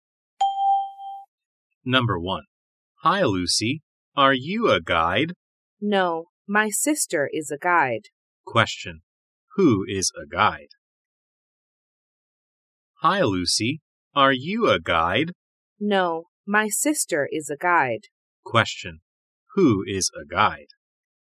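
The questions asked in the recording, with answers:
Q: Question, who is a guide?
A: Lucy's sister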